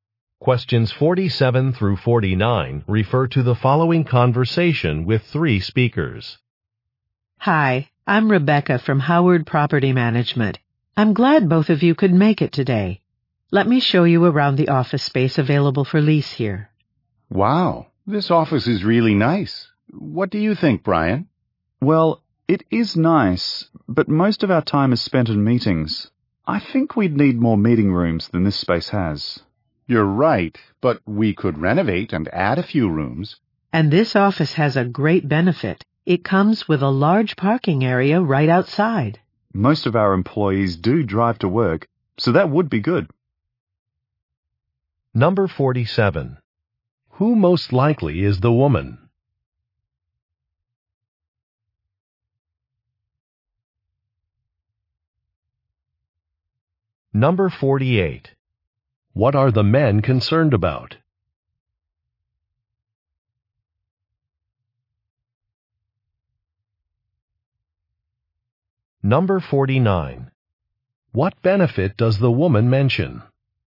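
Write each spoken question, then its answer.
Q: Who most likely is the woman?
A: A property manager

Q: What are the men concerned about?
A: Not enough meeting rooms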